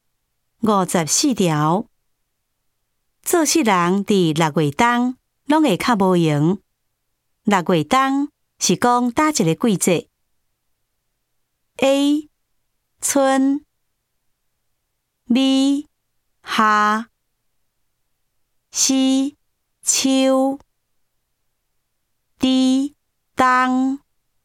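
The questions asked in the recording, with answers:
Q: 六月冬是讲哪一个季节 ?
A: B: 夏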